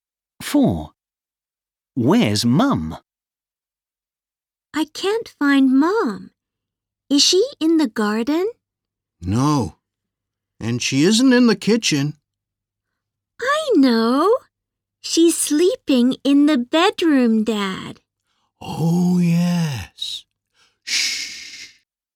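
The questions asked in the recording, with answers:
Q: Where's Mum?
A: sleeping in the bedroom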